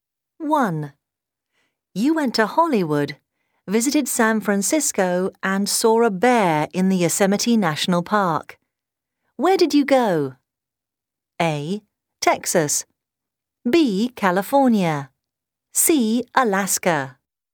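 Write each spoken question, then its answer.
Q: Where did you go?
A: B: California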